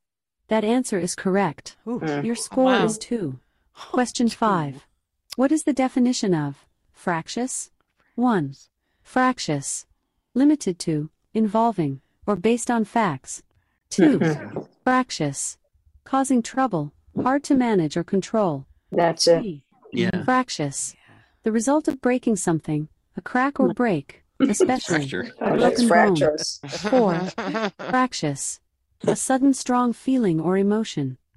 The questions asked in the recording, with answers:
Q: What is the definition of fractious?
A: That answer is correct.